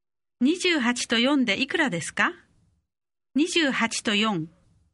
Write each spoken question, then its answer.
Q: 28と4でいくらですか28と4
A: 32 32